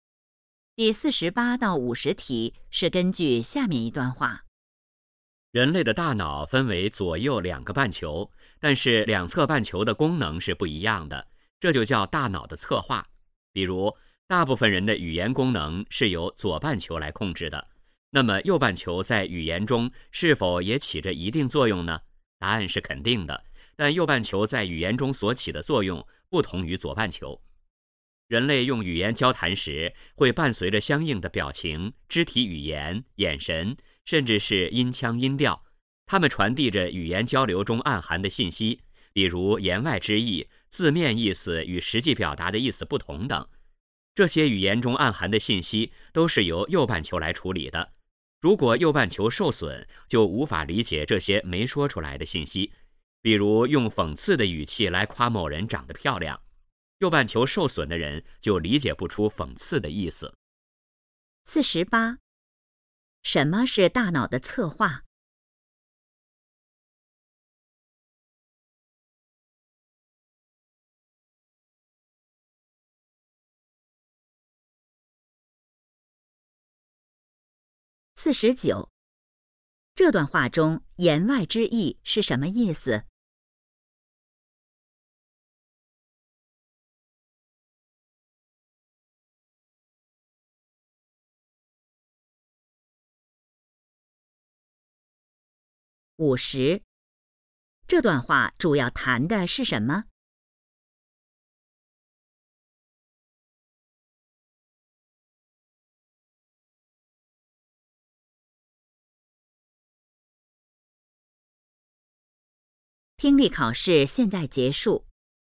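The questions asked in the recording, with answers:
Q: 什么是大脑的策划?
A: 大脑两侧半球功能不一样

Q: 这段话中言外之意是什么意思?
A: 语言交流中暗含的、没说出来的信息

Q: 这段话主要谈的是什么?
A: 大脑右半球在语言中的作用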